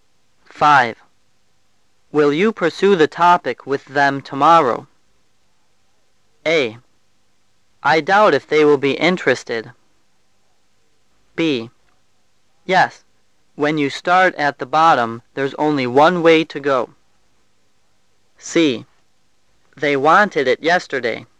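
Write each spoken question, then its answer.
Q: Will you pursue the topic with them tomorrow?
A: A: I doubt if they will be interested.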